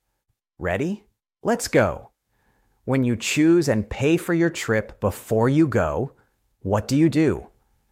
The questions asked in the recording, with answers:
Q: When you choose and pay for your trip before you go, what do you do?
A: That's right. Book.